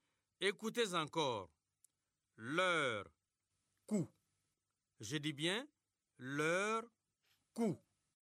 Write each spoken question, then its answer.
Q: Écoutez encore. Leur cou.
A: C'est couleur.